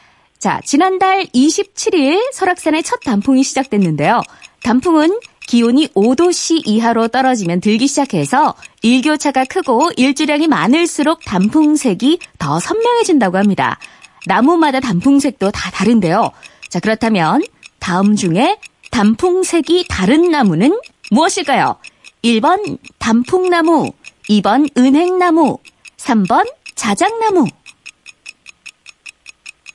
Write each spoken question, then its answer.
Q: 자, 그렇다면 다음 중에 단풍색이 다른 나무는 무엇일까요?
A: 네, 정답은 1번 단풍나무였습니다.